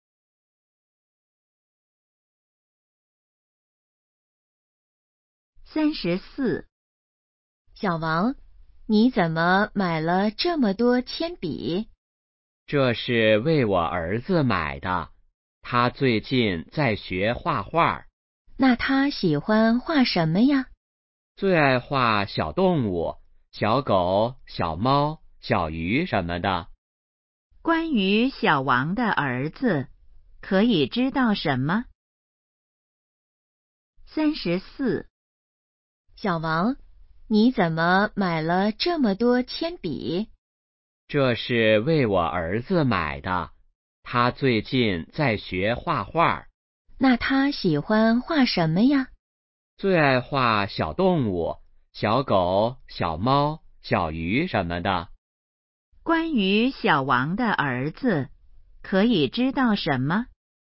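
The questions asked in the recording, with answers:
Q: 关于小王的儿子,可以知道什么?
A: 在学画画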